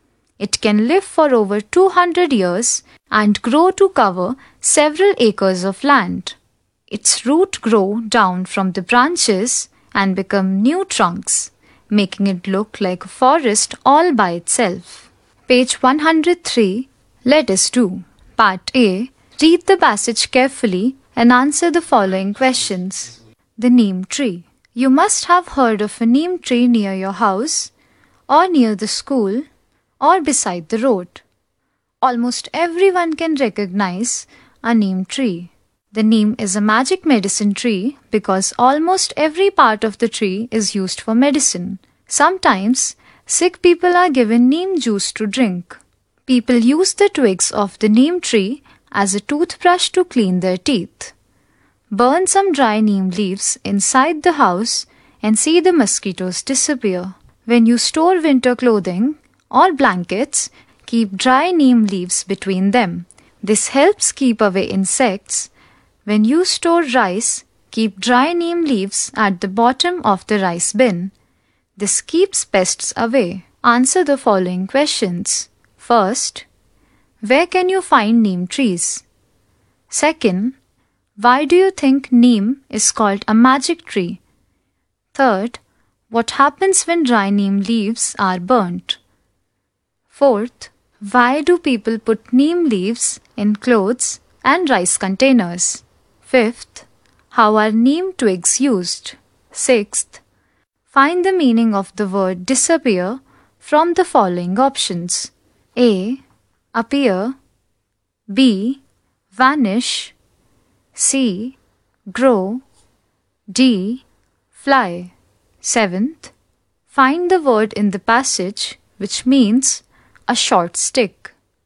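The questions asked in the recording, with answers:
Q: where can you find neem trees?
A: Near houses, schools or beside the road

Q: why do you think neem is called a magic tree?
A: Because almost every part of it is used for medicine

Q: what happens when dry neem leaves are burnt?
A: Mosquitoes disappear

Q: why do people put neem leaves in clothes and rice containers?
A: To keep away insects and pests

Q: how are neem twigs used?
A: As a toothbrush to clean teeth

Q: find the meaning of the word disappear from the following options.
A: B: Vanish.

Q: find the word in the passage which means a short stick.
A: C: Twig.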